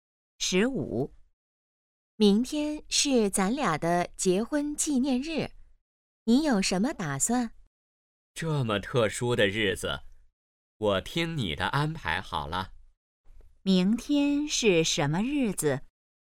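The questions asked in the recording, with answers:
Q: 明天是什么日子?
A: 结婚纪念日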